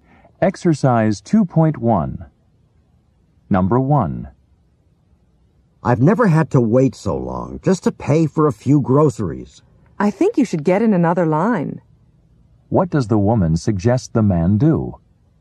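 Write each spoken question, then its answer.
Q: What does the woman suggest the man do?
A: Get in another line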